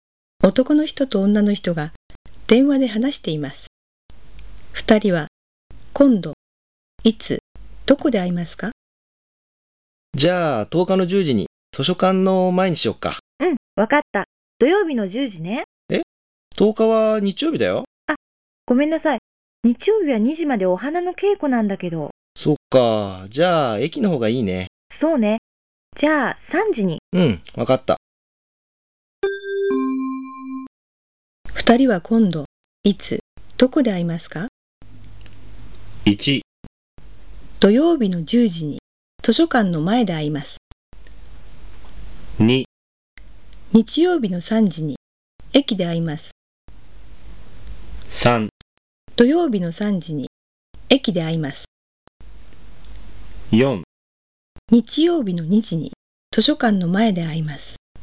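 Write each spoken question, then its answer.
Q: 二人は今度、いつ、どこで会いますか?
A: 2: 日曜日の3時に駅で会います。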